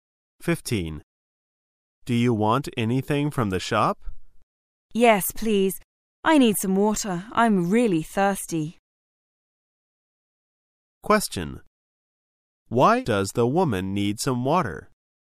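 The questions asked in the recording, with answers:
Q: Why does the woman need some water?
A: She is really thirsty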